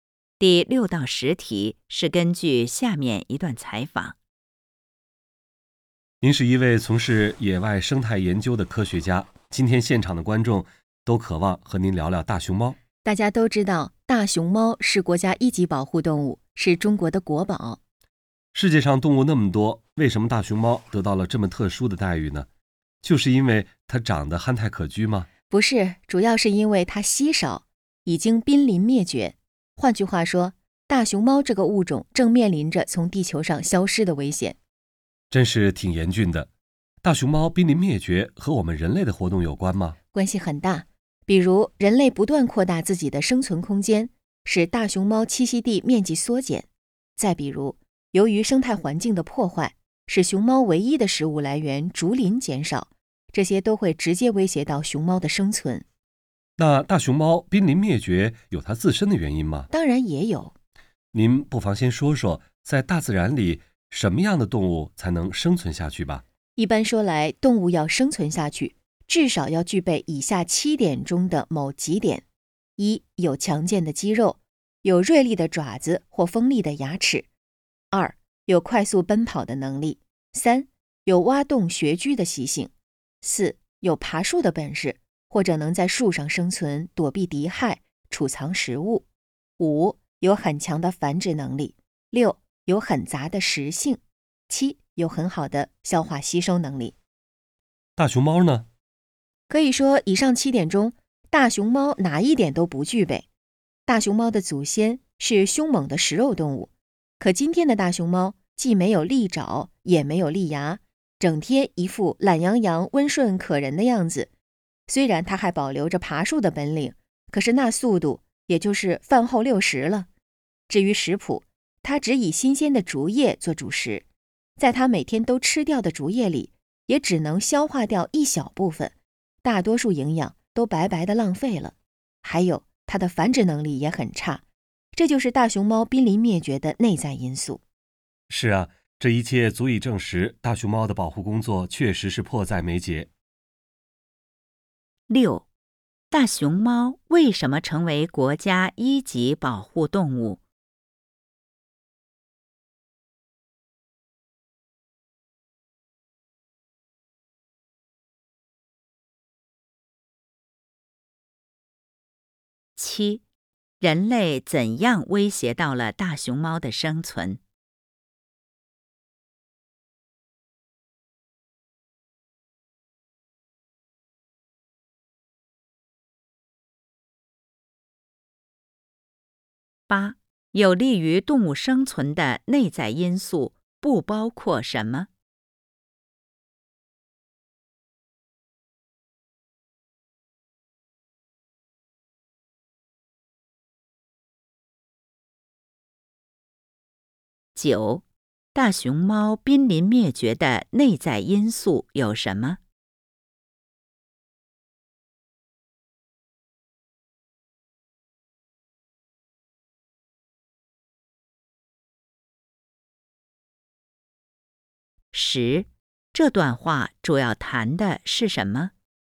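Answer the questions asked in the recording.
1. 因为它稀少,已经濒临灭绝
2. 扩大生存空间使栖息地缩减,破坏生态环境使竹林减少
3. 没有利爪利牙、爬树慢、食性单一、消化能力差、繁殖能力差
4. 大熊猫濒临灭绝的原因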